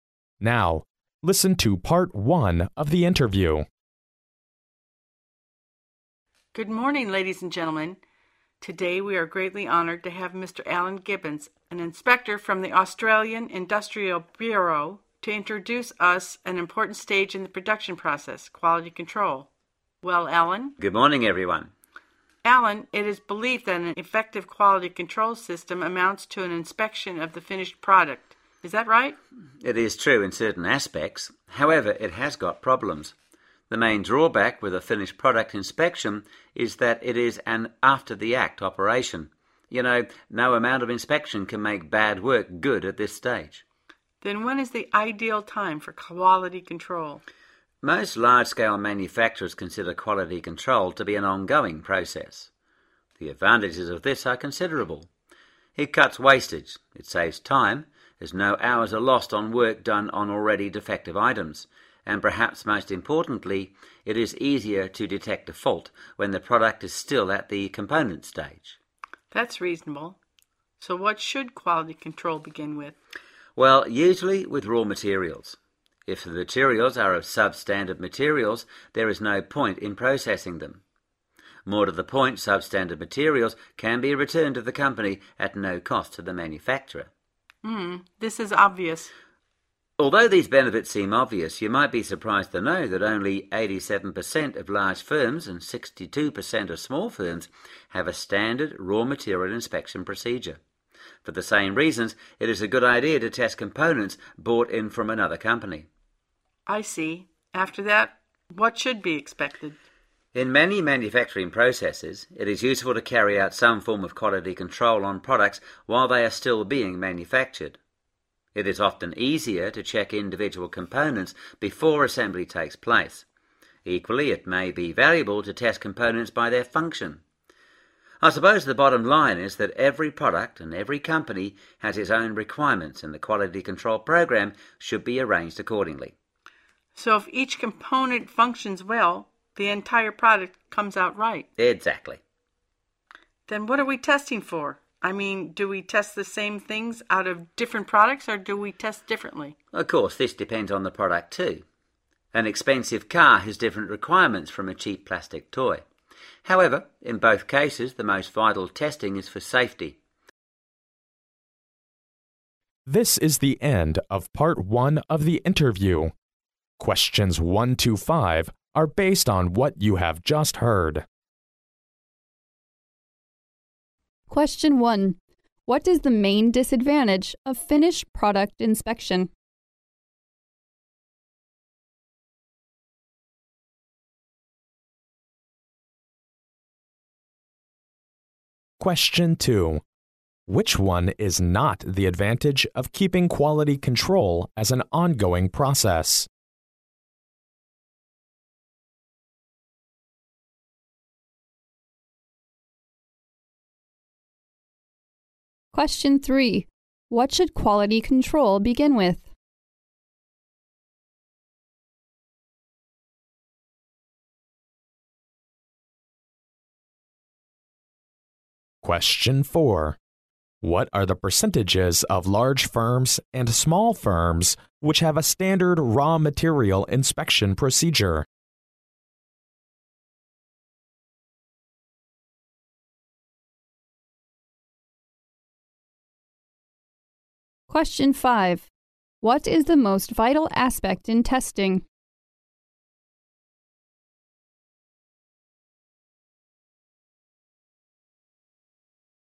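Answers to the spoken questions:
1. It is an after-the-act operation; no amount of inspection can make bad work good at that stage.
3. Raw materials
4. 87% of large firms and 62% of small firms
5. Safety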